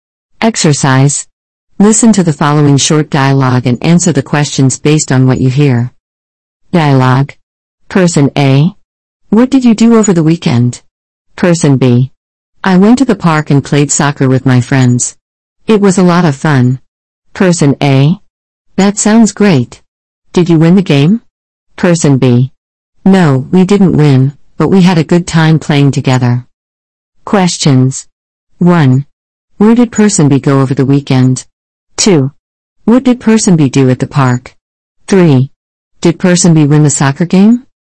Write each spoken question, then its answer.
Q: Where did Person B go over the weekend?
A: Person B went to the park over the weekend.

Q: What did Person B do at the park?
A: Person B played soccer with their friends at the park.

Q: Did Person B win the soccer game?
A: No, Person B didn't win the soccer game.